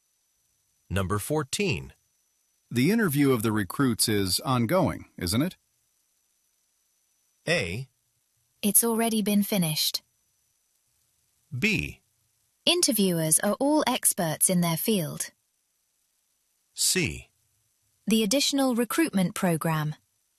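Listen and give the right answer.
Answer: A: It's already been finished.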